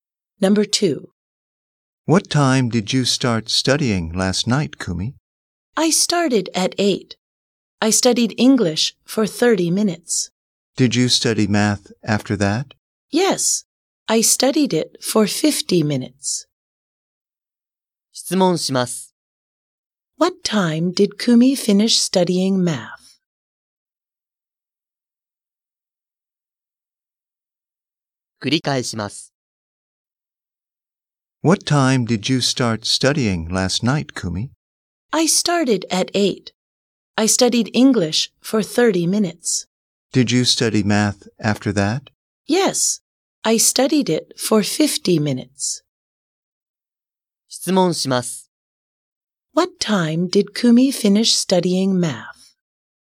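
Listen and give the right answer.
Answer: At 9:20.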